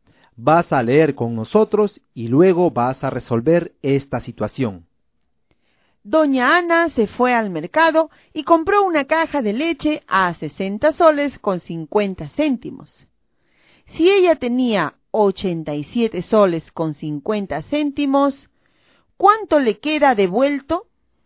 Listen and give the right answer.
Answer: La respuesta en la situación anterior era la alternativa A, es decir, 27 soles.